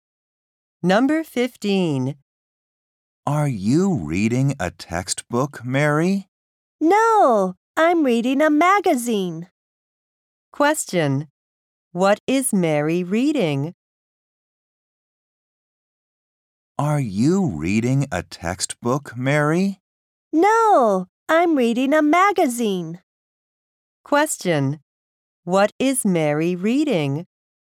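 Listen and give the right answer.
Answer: A magazine.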